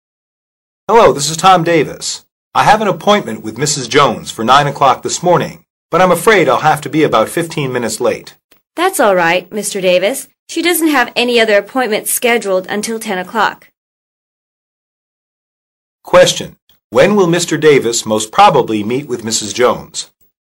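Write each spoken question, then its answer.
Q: When will Mr. Davis most probably meet with Mrs.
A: At about 9:15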